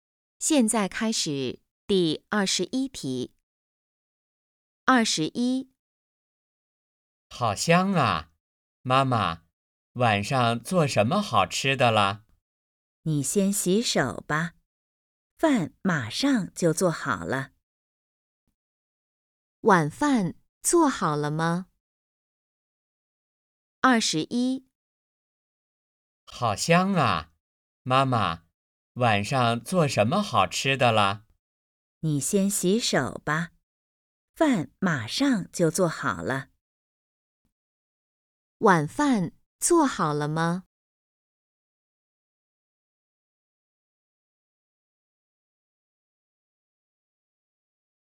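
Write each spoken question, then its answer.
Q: 晚饭做好了吗?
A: 还没有,马上就好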